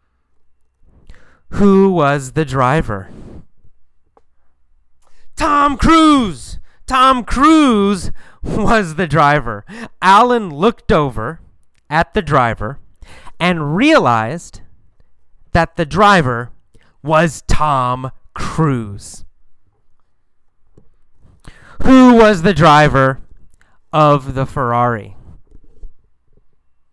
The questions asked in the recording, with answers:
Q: Who was the driver of the Ferrari?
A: Tom Cruise. Tom Cruise was the driver of the Ferrari.